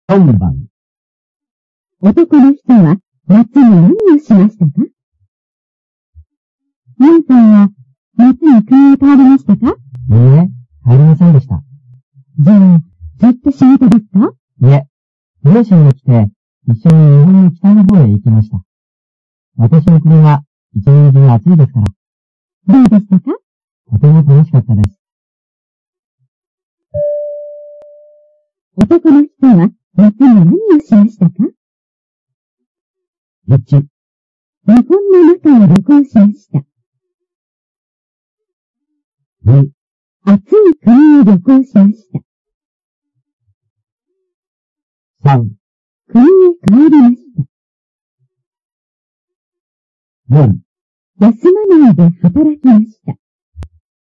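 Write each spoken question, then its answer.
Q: 男の人は夏に何をしましたか?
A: 1: 日本の中を旅行しました。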